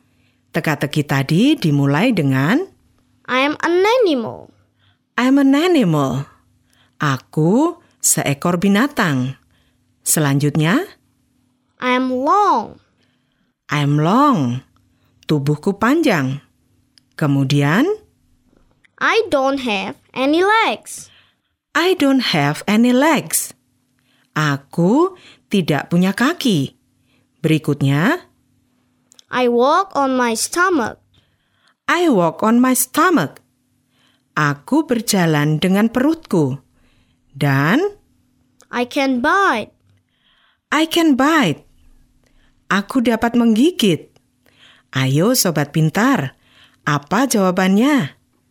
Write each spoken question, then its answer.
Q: Ayo, sobat pintar. Apa jawabannya?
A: Benar sekali. Binatang itu adalah seekor ular atau a snake.